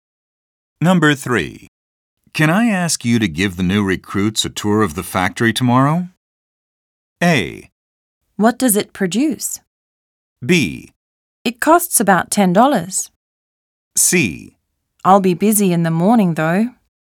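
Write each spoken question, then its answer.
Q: Can I ask you to give the new recruits a tour of the factory tomorrow?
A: C: I'll be busy in the morning, though.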